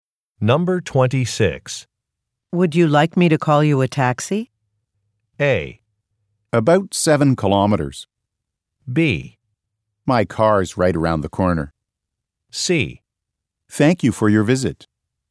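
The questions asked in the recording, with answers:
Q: Would you like me to call you a taxi?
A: B: My car's right around the corner.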